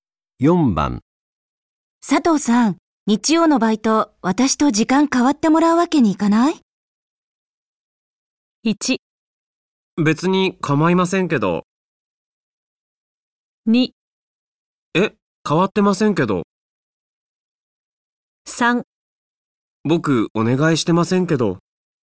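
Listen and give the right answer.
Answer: 1: 別に構いませんけど。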